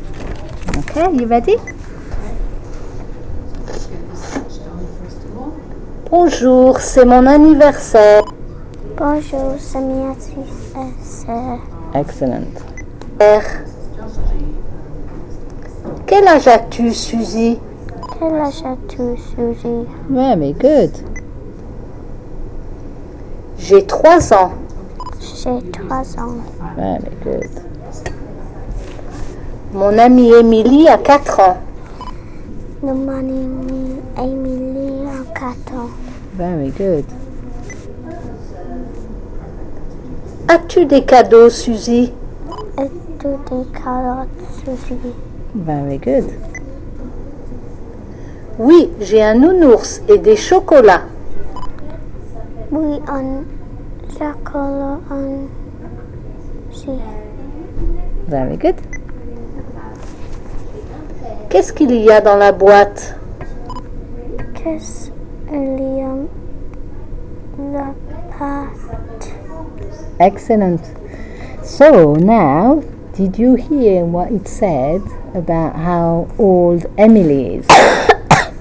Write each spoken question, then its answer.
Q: did you hear what it said about how old Emily is?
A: Mon amie Emily a 4 ans.